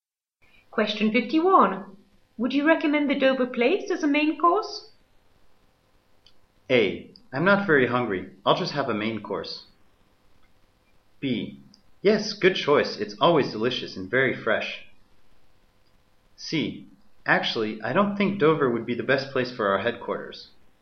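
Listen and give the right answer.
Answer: B: Yes, good choice. It's always delicious and very fresh.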